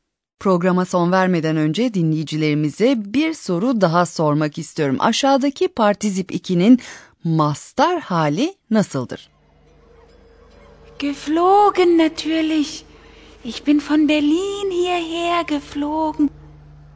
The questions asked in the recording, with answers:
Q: Aşağıdaki partizip 2'nin mastar hali nasıldır?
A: Mastar hali uçmak yani fliegen.